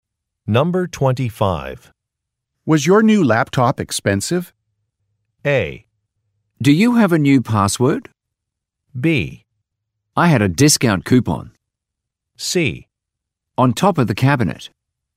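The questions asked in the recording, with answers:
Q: Was your new laptop expensive?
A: B: I had a discount coupon.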